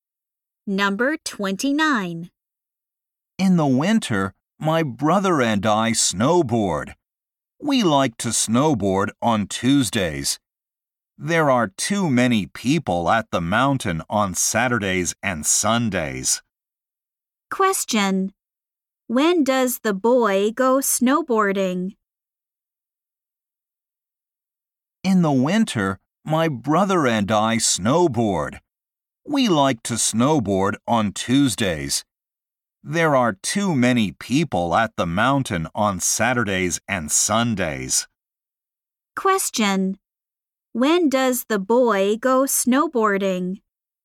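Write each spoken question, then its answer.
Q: When does the boy go snowboarding?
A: On Tuesdays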